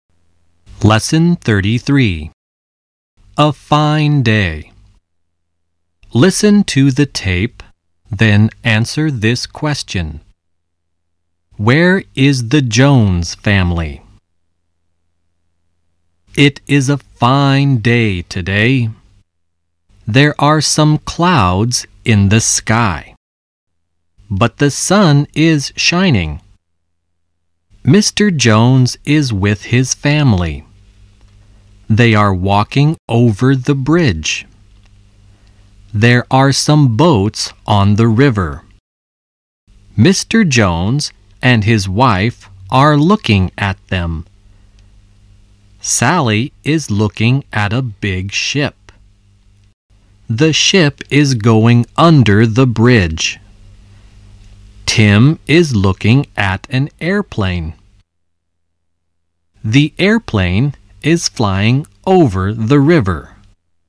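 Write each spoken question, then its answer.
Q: Where is the Jones family?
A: On the bridge (walking over the bridge)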